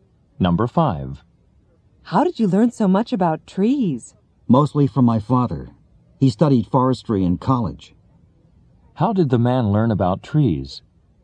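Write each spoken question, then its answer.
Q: How did the man learn about trees?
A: Mostly from his father, who studied forestry.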